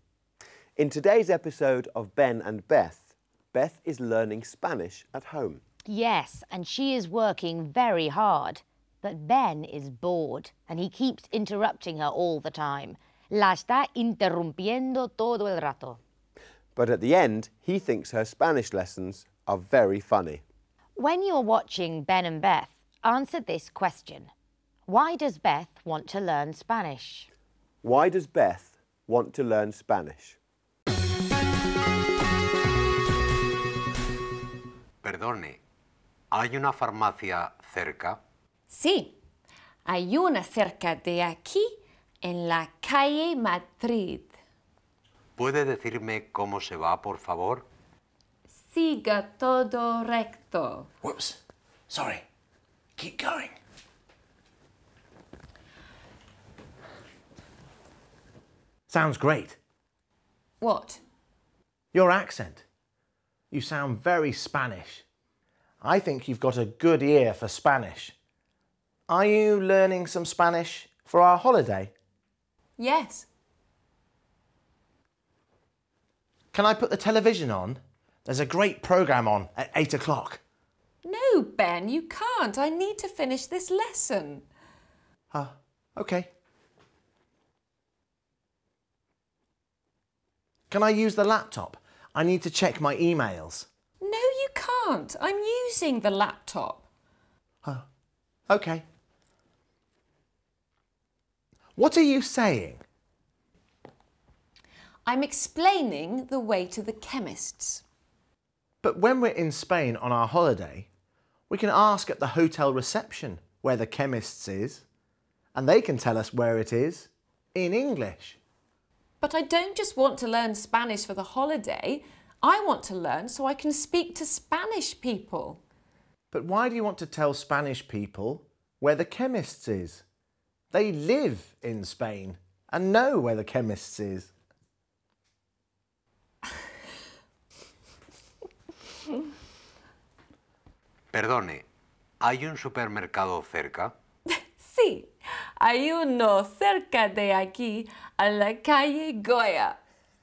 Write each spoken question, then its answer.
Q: Why does Beth want to learn Spanish?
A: So the answer is because she wants to speak to Spanish people.